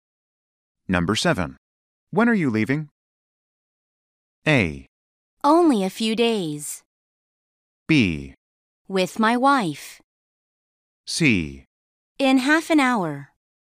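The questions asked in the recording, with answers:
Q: When are you leaving?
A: C: In half an hour.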